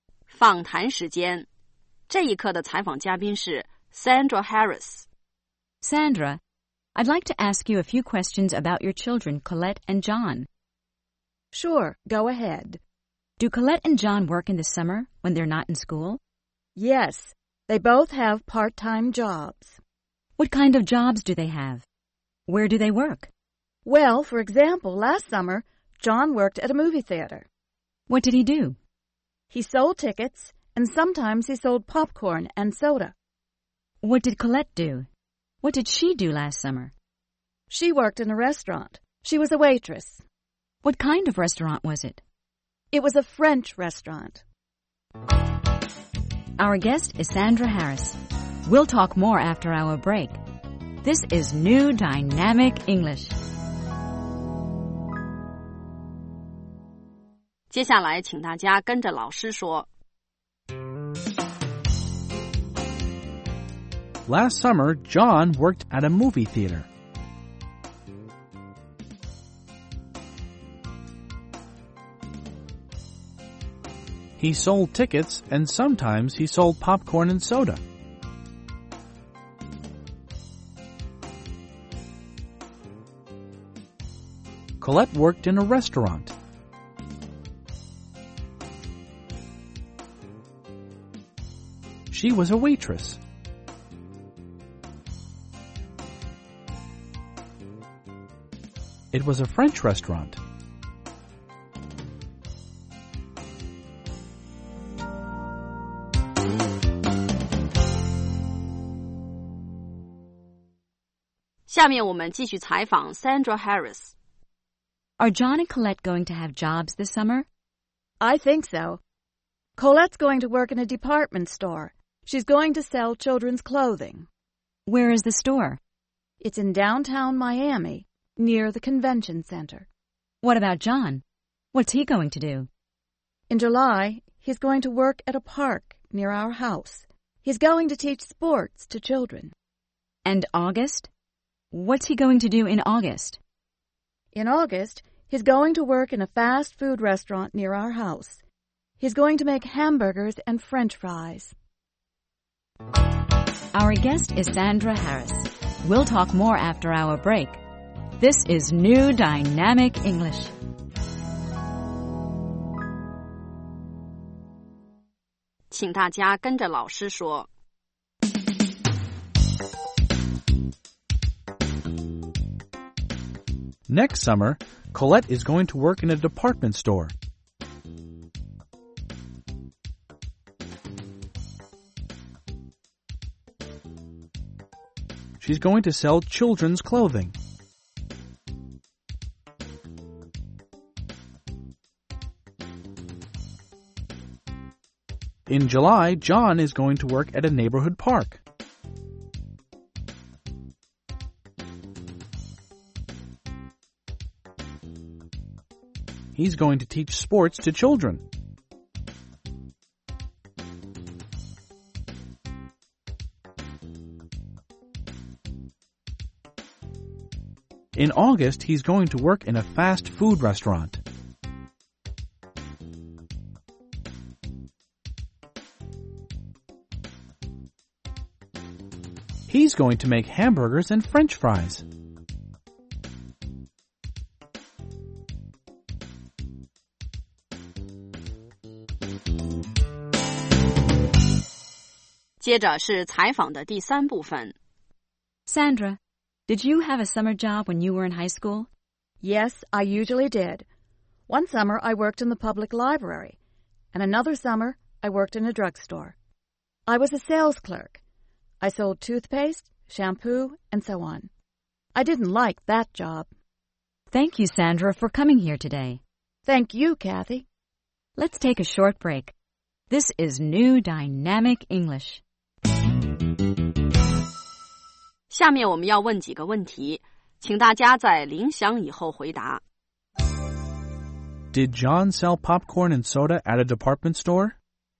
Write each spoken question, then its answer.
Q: Did John sell popcorn and soda at a department store?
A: No, he didn't. He sold popcorn and soda at a movie theater.